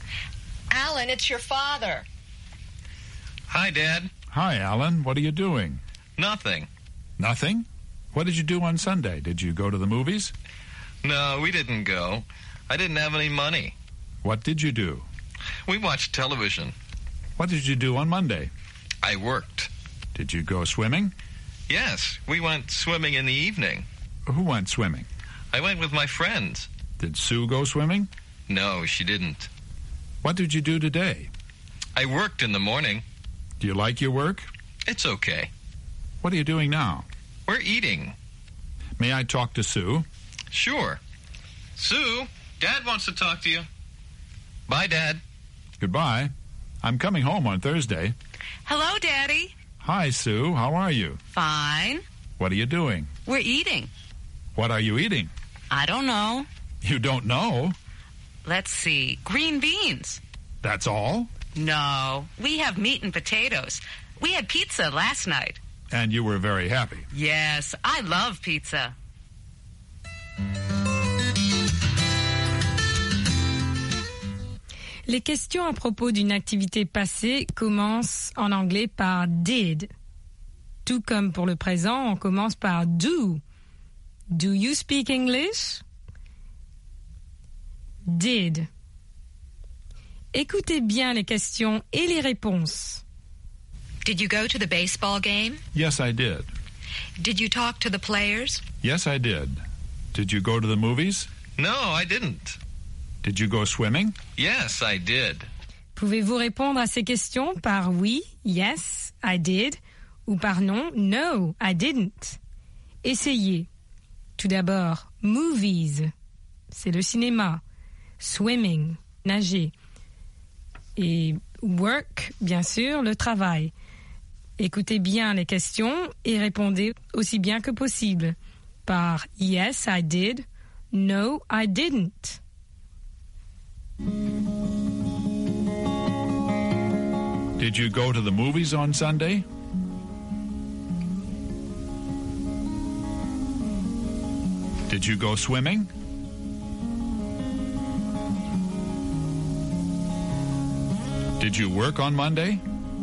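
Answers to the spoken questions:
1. No, I didn't.
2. Yes, I did.
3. Yes, I did.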